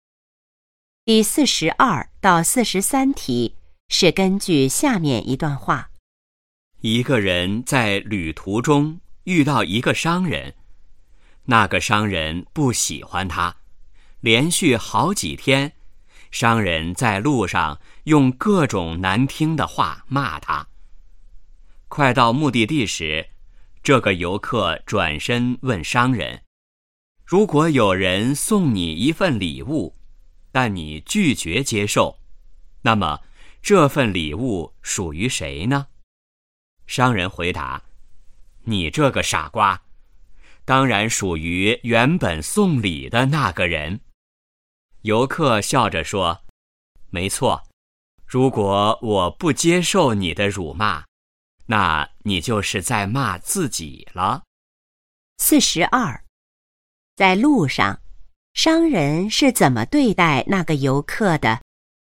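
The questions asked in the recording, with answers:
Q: 在路上,商人是怎么对待那个游客的?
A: 用各种难听的话骂他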